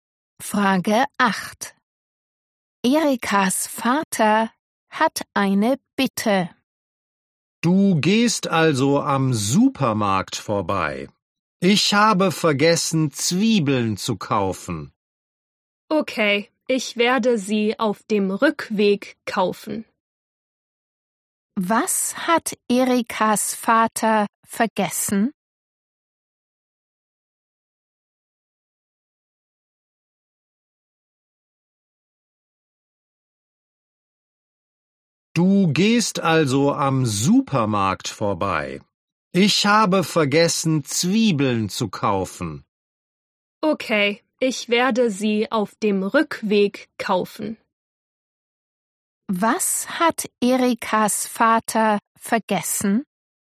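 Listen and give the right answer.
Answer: Zwiebeln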